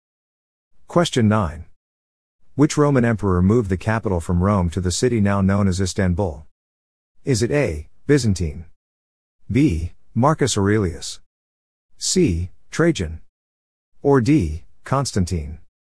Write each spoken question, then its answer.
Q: Which Roman emperor moved the capital from Rome to the city now known as Istanbul?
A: The answer is D. Constantine.